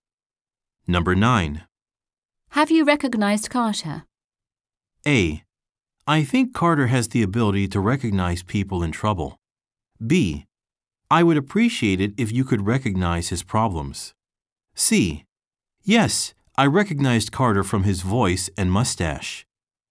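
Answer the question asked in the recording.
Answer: C: Yes, I recognized Carter from his voice and mustache.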